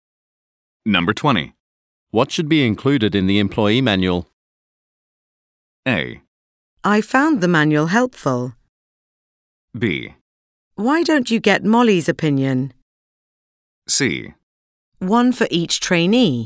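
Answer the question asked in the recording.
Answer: B: Why don't you get Molly's opinion?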